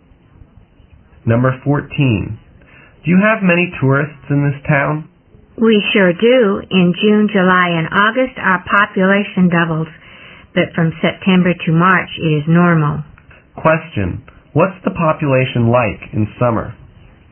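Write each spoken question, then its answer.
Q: What's the population like in summer?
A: It doubles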